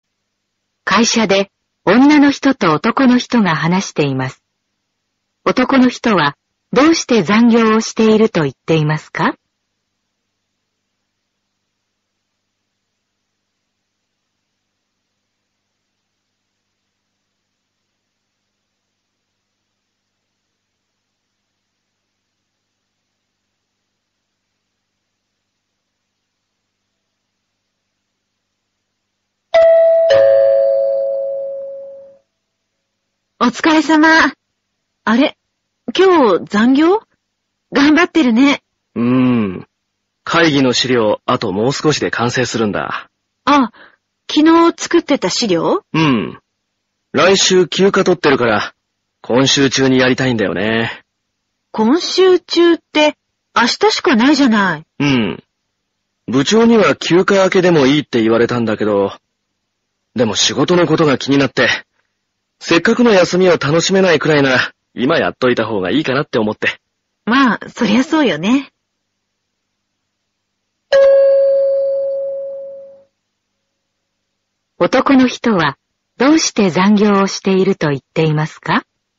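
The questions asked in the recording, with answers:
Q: 男の人は、どうして残業をしていると言っていますか?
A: 来週の休暇を仕事を気にせず楽しみたいから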